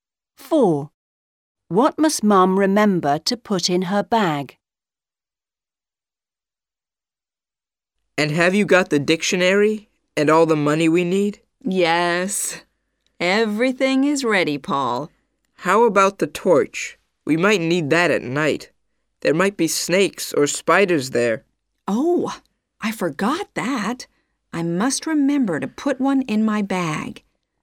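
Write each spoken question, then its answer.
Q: What must Mum remember to put in her bag?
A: A torch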